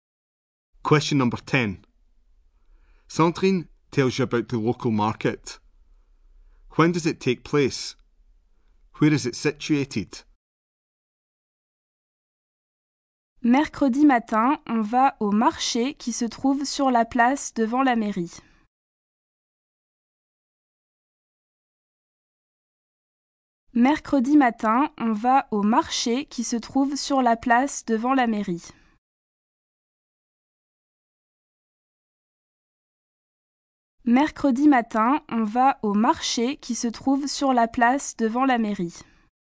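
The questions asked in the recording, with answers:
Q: When does it take place? Where is it situated?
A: Wednesday morning; in the square in front of the town hall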